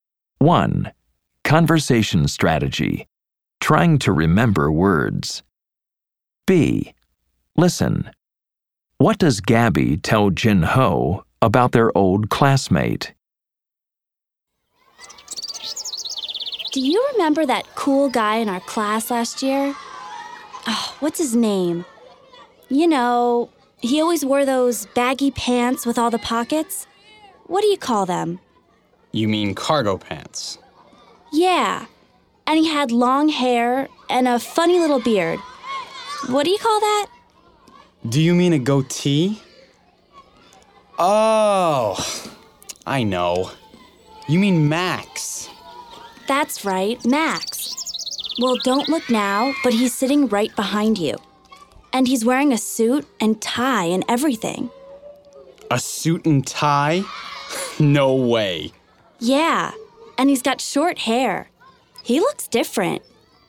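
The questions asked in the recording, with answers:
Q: What does Gabby tell Jin Ho about their old classmate?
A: Max is sitting right behind him, wearing a suit and tie, and he has short hair now and looks different.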